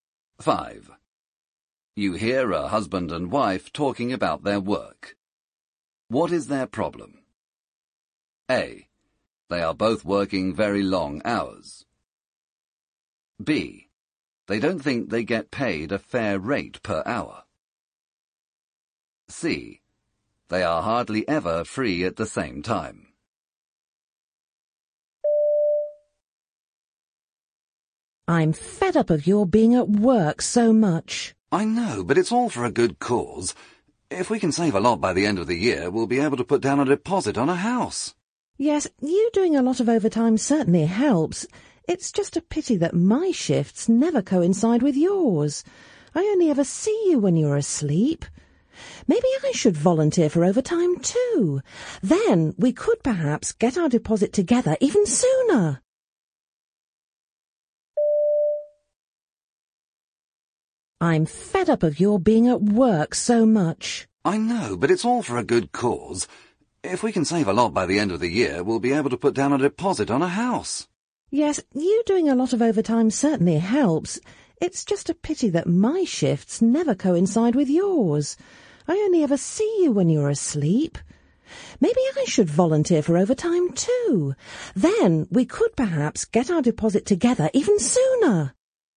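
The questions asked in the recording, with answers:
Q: What is their problem?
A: C: They are hardly ever free at the same time.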